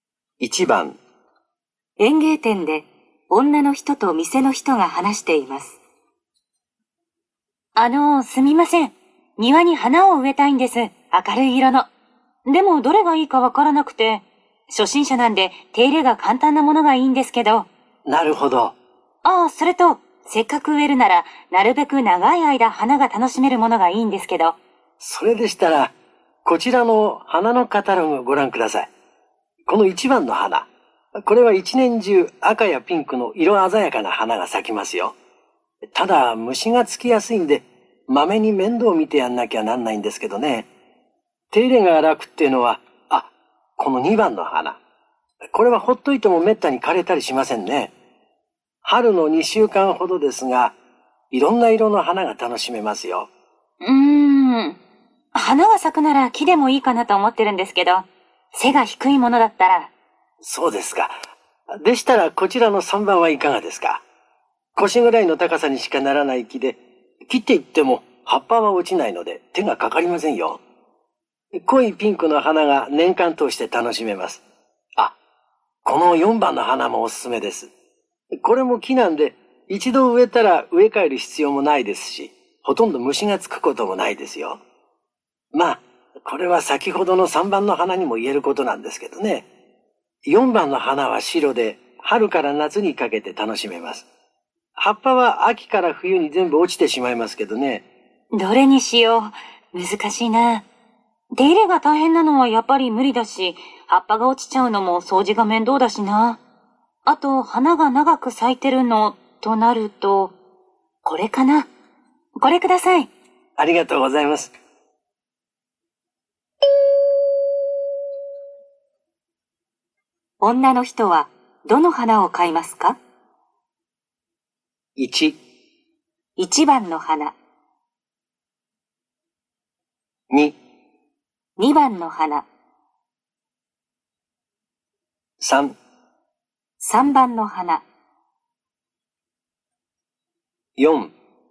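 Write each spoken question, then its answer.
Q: 女の人はどの花を買いますか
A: 3: 3番の花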